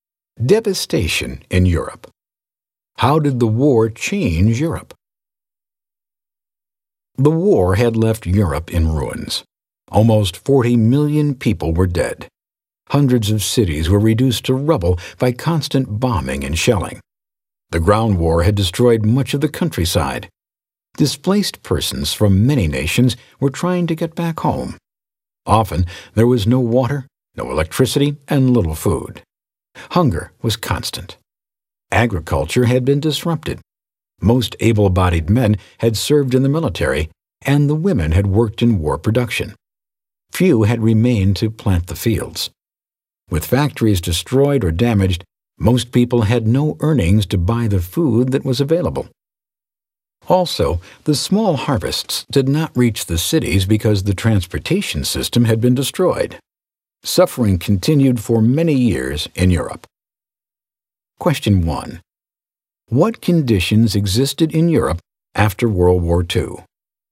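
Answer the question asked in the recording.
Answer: Europe was in ruins: about 40 million dead, cities destroyed, displaced persons, no water or electricity, hunger and little food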